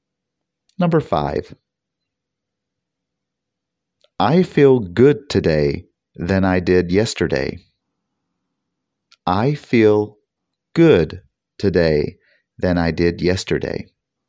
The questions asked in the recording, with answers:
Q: I feel good today than I did yesterday.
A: The answer is better.